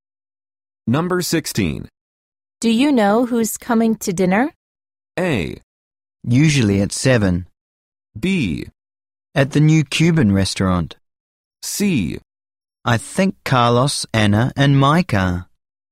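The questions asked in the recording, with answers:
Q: Do you know who's coming to dinner?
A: C: I think Carlos, Anna, and Micah.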